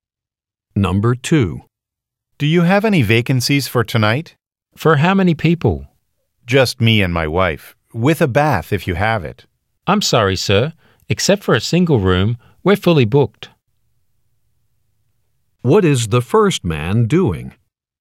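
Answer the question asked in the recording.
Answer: Asking for a hotel room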